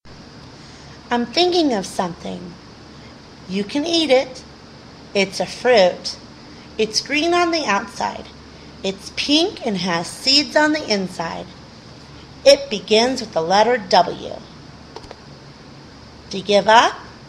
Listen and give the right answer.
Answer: The answer is a watermelon.